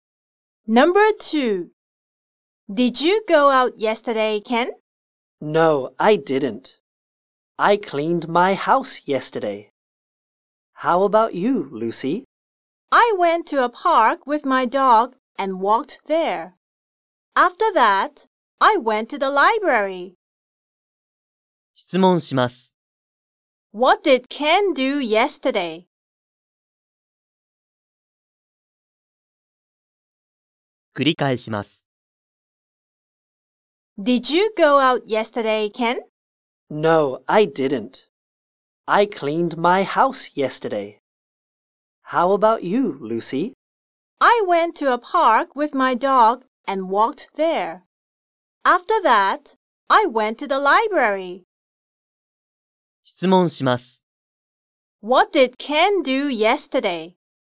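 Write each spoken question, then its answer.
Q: What did Ken do yesterday?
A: He cleaned his house.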